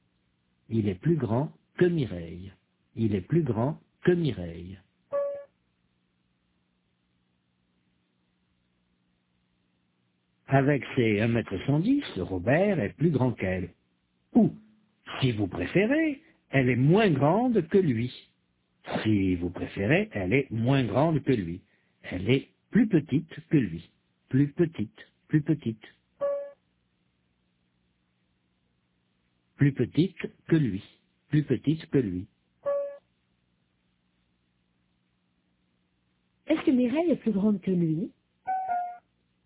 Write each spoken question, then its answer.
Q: Est-ce que Mireille est plus grande que lui?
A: Non, elle est plus petite que lui.